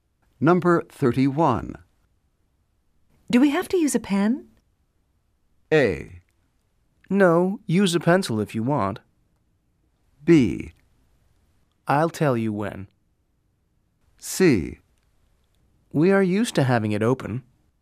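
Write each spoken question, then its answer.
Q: Do we have to use a pen?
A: A: No, use a pencil if you want.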